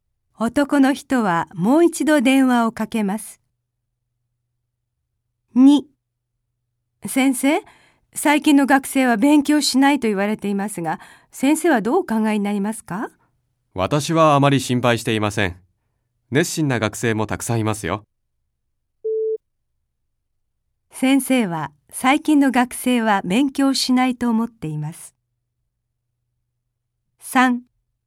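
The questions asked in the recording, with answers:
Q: 先生は最近の学生は勉強しないと思っています。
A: いいえ(熱心な学生もたくさんいると思っています)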